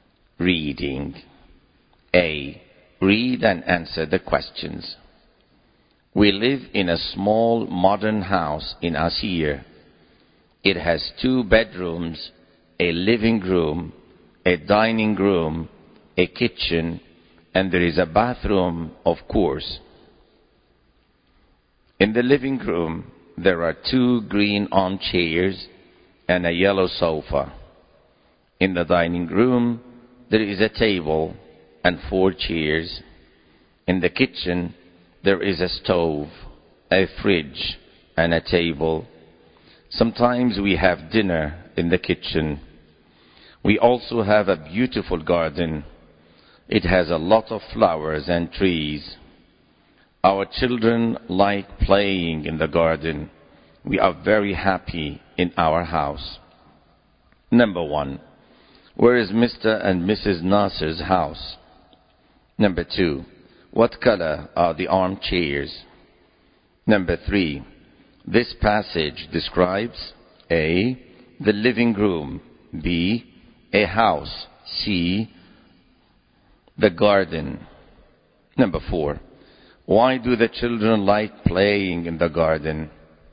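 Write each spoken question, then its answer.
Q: Where is Mr. and Mrs. Nasser's house?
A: In Asir

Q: What color are the armchairs?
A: Green

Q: This passage describes A. The living room. B. A house. C. The garden.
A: B: A house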